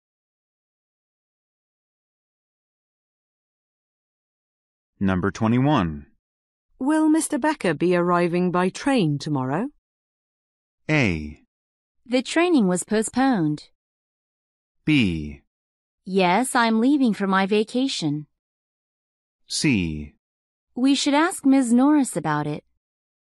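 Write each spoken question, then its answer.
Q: Will Mr. Becker be arriving by train tomorrow?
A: C: We should ask Ms. Norris about it.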